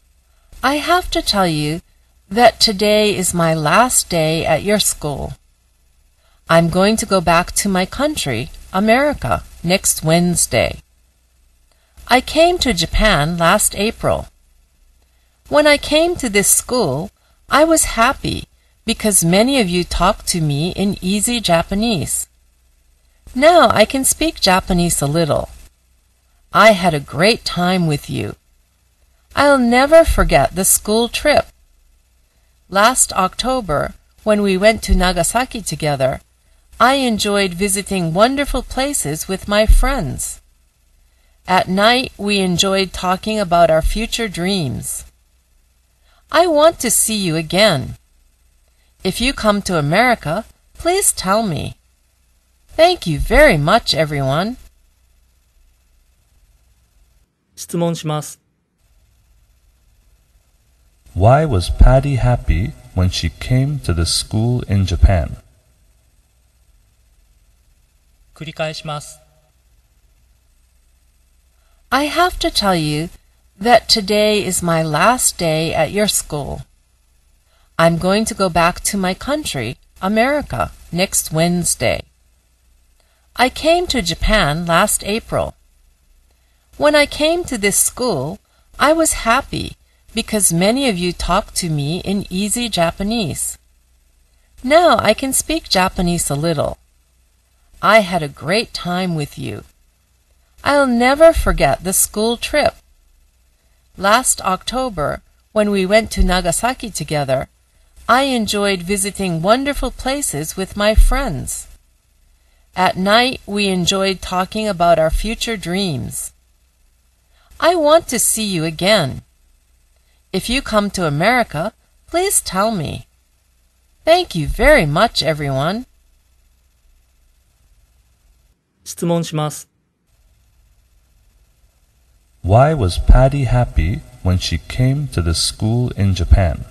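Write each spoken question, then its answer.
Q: Why was Patty happy when she came to the school in Japan?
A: Because many students talked to her in easy Japanese.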